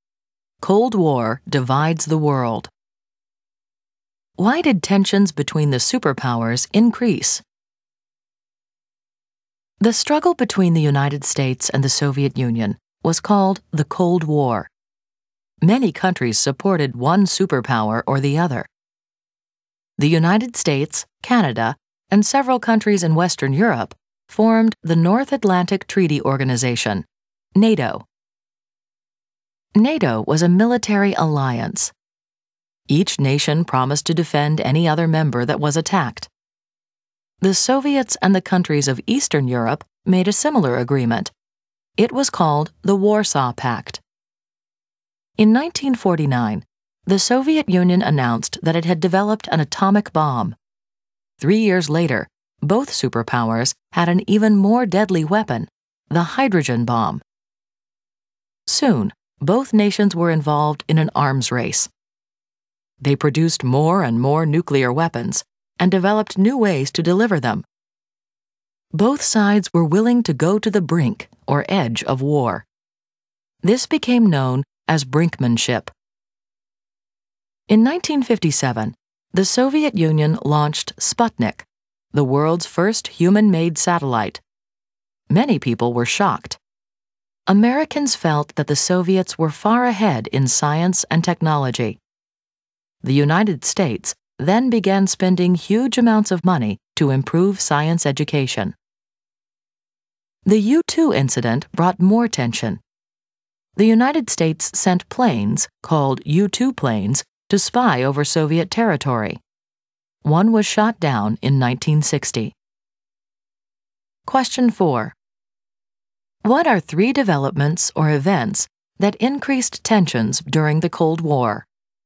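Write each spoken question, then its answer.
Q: What are three developments or events that increased tensions during the Cold War?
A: The arms race (atomic and hydrogen bombs), the launch of Sputnik, and the U-2 incident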